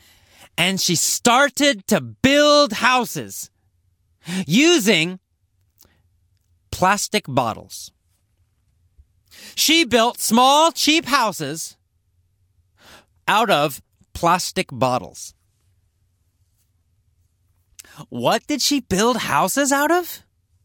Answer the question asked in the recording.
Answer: Out of plastic bottles. She built houses out of plastic bottles.